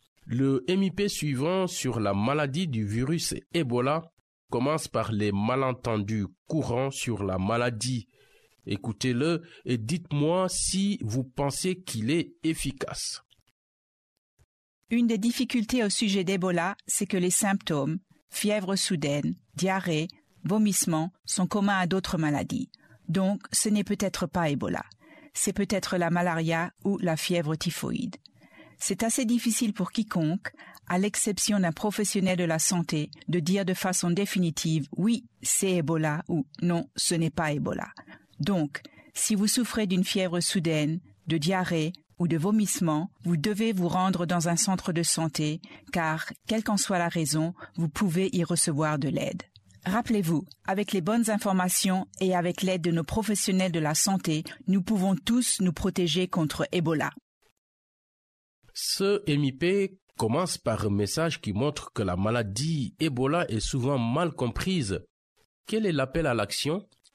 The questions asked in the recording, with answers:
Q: Quel est l'appel à l'action ?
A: Qu'on doit passer un test au centre de santé ?